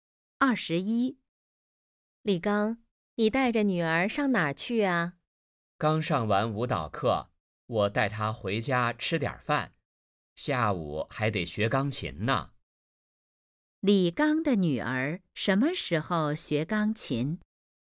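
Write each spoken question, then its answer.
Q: 李刚的女儿什么时候学钢琴?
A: 下午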